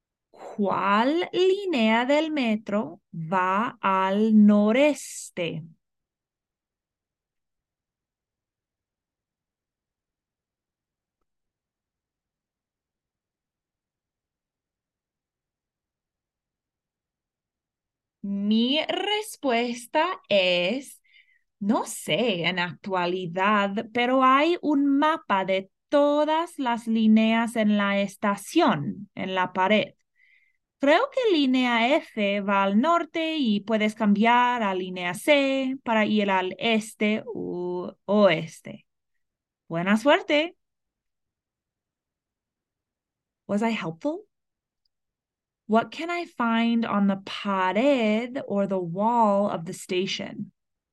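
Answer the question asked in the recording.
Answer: A map of all the metro lines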